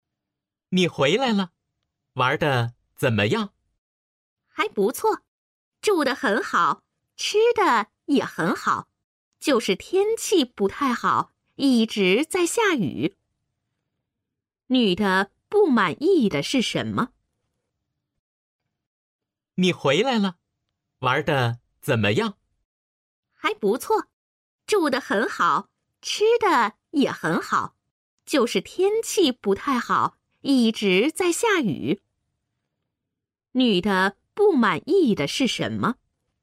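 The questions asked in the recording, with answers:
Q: 女的不满意的是什么?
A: 天气不好,一直下雨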